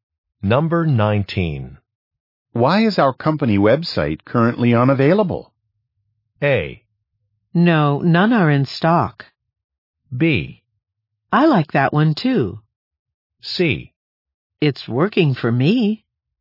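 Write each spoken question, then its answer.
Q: Why is our company website currently unavailable?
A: C: It's working for me.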